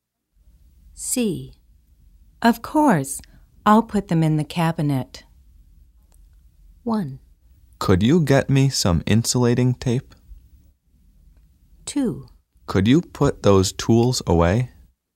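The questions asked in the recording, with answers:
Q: Of course, I'll put them in the cabinet.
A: 2: Could you put those tools away?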